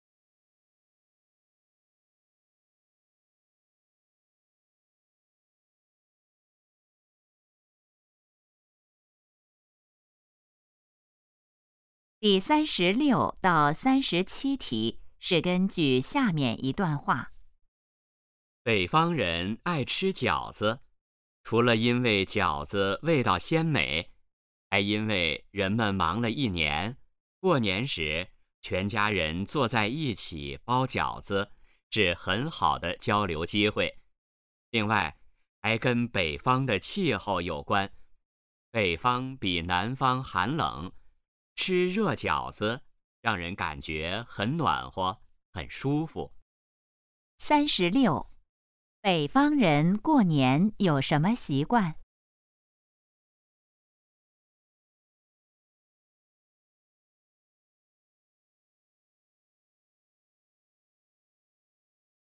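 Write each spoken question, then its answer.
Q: 北方人过年有什么习惯?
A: 全家一起包饺子、吃饺子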